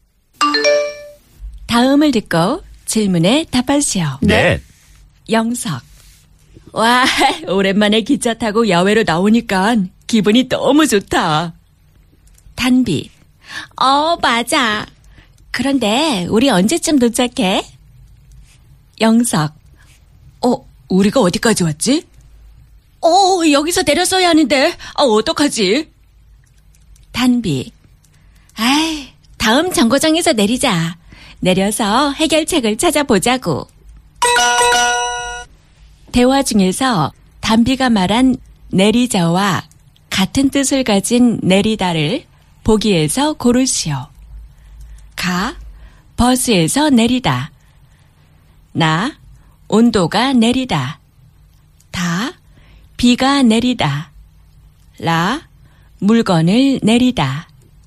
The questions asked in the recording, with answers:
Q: 대화 중에서 단비가 말한 내리자와 같은 뜻을 가진 내리다를 보기에서 고르시오 가 버스에서 내리다 나 온도가 내리다 다 비가 내리다. 라, 물건을 내리다.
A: 가 내리 버스에서 내리다 to get off the bus.